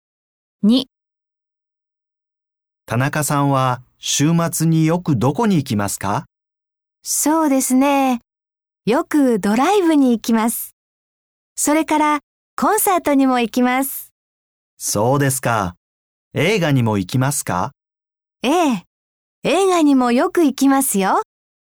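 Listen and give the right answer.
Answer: ドライブ、コンサート、映画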